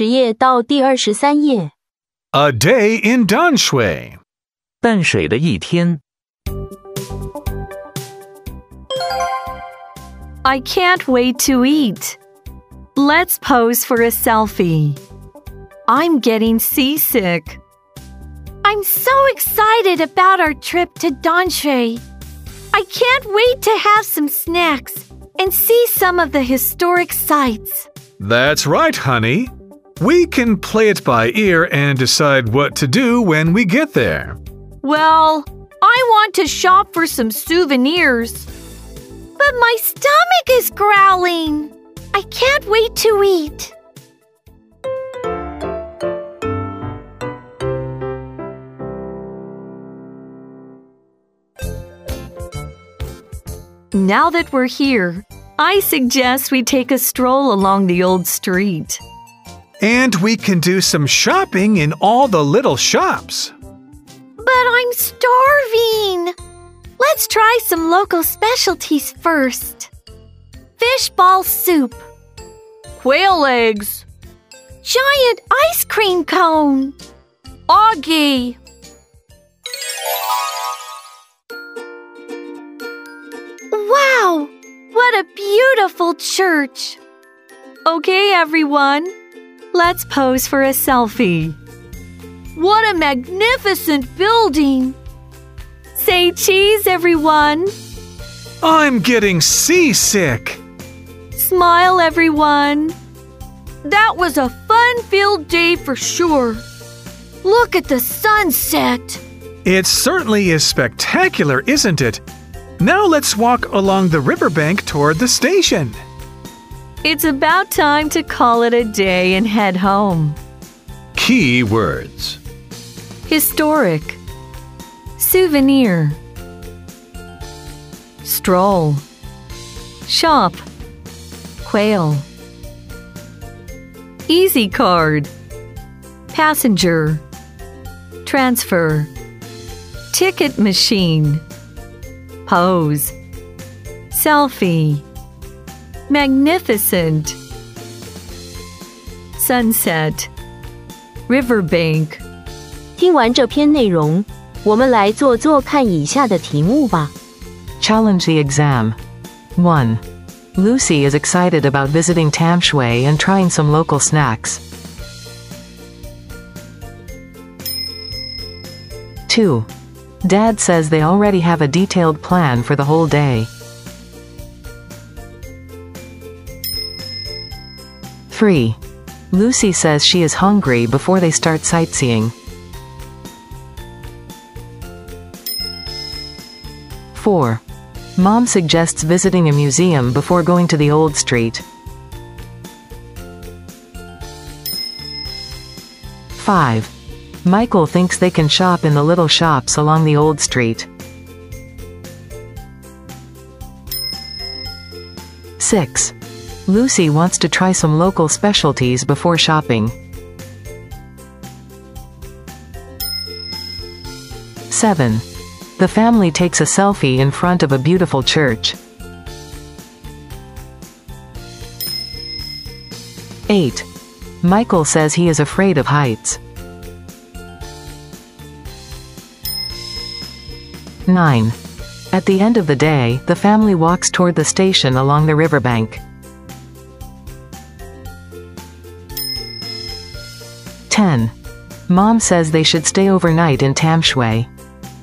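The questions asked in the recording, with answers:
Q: Dad says they already have a detailed plan for the whole day.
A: False

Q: Mom suggests visiting a museum before going to the old street.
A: False

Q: The family takes a selfie in front of a beautiful church.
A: True

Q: Michael says he is afraid of heights.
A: False

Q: At the end of the day, the family walks toward the station along the riverbank.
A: True

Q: Mom says they should stay overnight in Tamshui.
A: False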